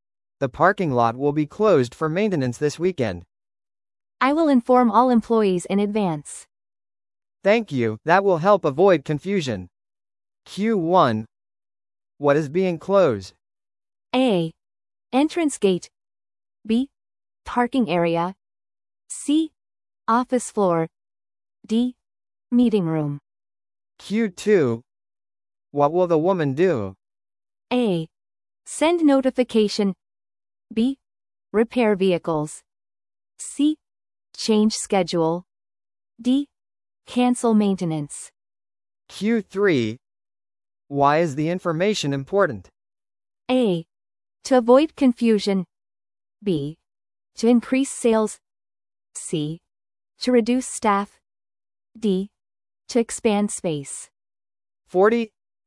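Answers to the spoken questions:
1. B: Parking area.
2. A: Send notification.
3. A: To avoid confusion.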